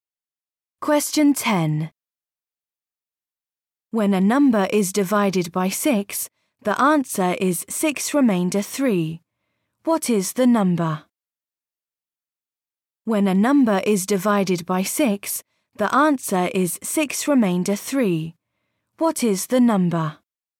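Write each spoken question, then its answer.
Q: What is the number?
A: 39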